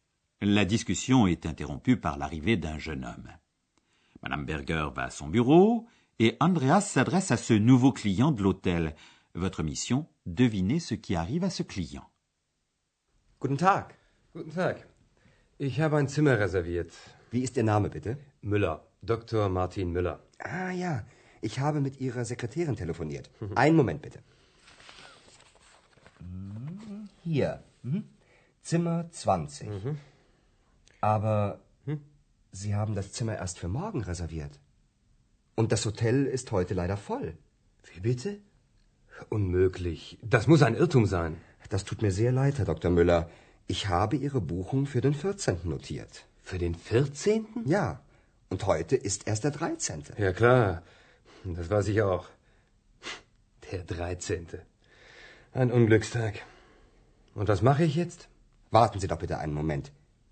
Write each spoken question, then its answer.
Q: Votre mission, devinez ce qui arrive à ce client.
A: Il arrive quelque chose de désagréable à ce monsieur Müller. Il s'est trompé de date dans sa réservation de chambre d'hôtel. Il a fait réserver pour le lendemain.